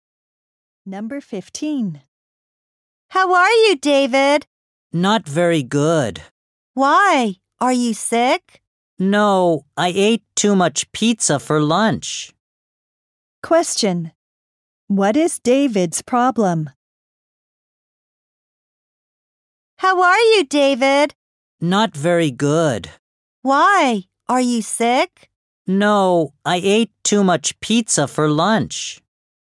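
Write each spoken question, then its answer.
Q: Question. What is David's problem?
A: He ate too much pizza for lunch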